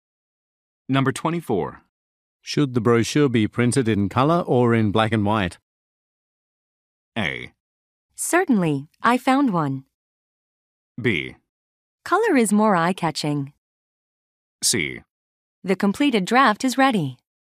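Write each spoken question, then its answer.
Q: Should the brochure be printed in color or in black and white?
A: B: Color is more eye-catching.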